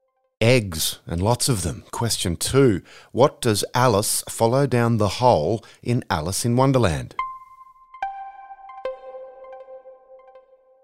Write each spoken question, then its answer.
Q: What does Alice follow down the hole in Alice in Wonderland?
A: The White Rabbit.